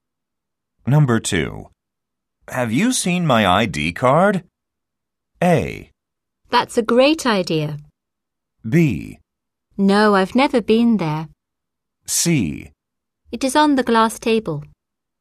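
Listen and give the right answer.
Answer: C: It is on the glass table.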